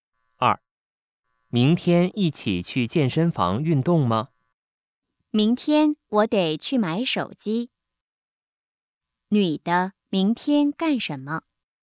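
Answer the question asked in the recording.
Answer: 去买手机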